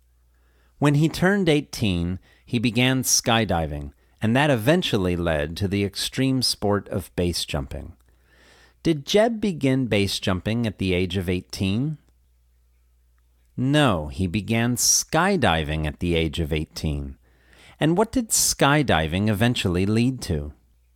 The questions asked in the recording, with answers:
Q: And what did skydiving eventually lead to?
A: Skydiving eventually led to the extreme sport of base jumping.